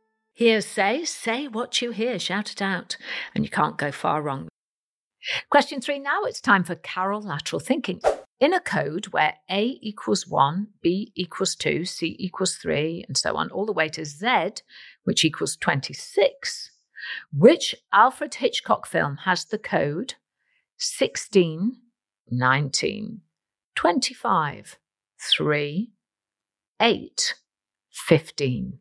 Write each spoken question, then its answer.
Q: In a code where A equals 1, B equals 2, C equals 3, and so on, all the way to Z, which equals 26, which Alfred Hitchcock film has the code 16, 19, 25, 3, 8, 15?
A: And the answer is the movie Psycho, P-S-Y-C-H-O.